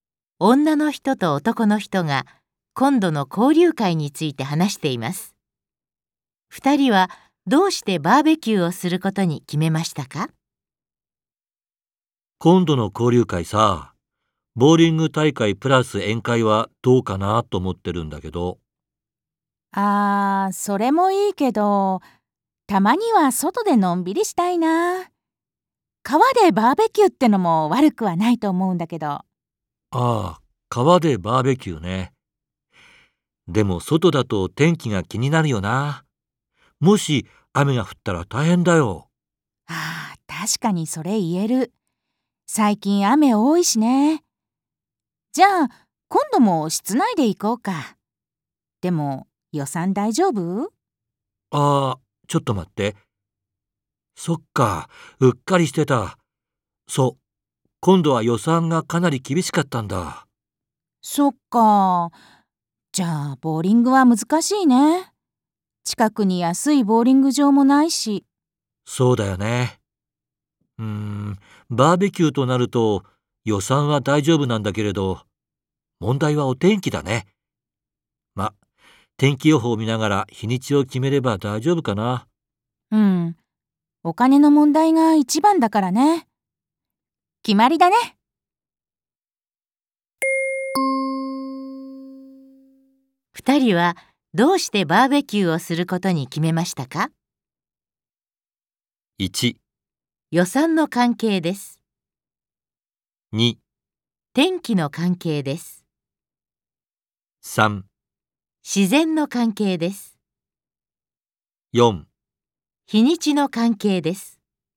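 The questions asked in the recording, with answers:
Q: 二人はどうしてバーベキューをすることに決めましたか?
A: 1: 予算の関係です。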